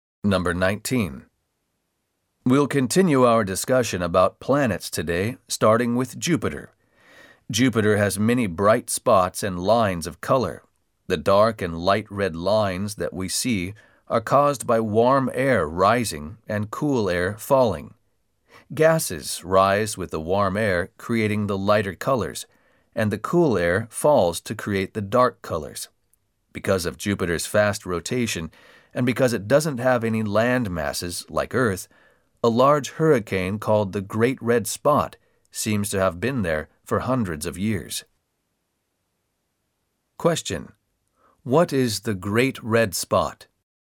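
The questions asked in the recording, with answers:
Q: What is the Great Red Spot?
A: A large hurricane on Jupiter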